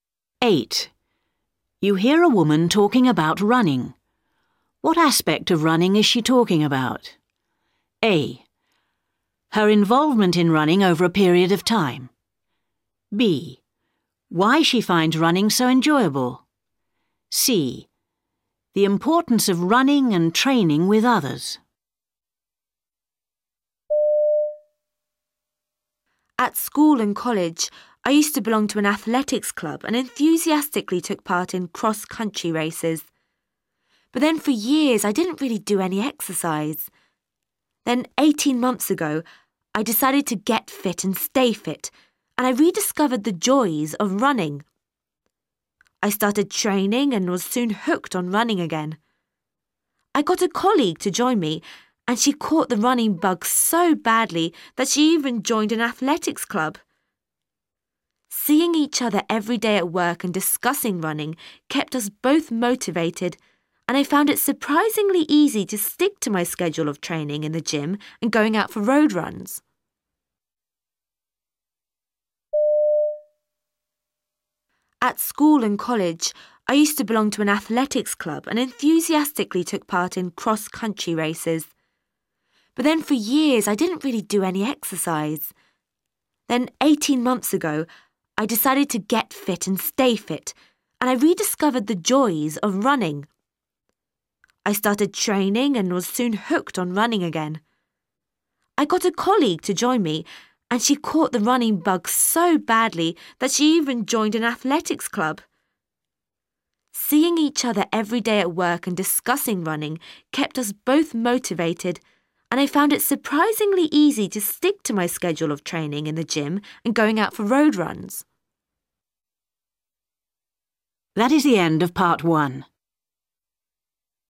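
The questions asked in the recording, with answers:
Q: What aspect of running is she talking about?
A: A: Her involvement in running over a period of time.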